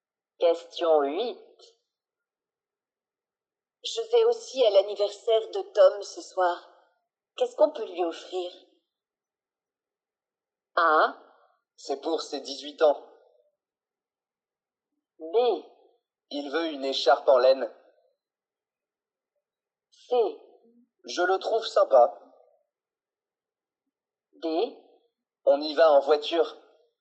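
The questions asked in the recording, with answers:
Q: Qu'est-ce qu'on peut lui offrir?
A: B: Il veut une écharpe en laine.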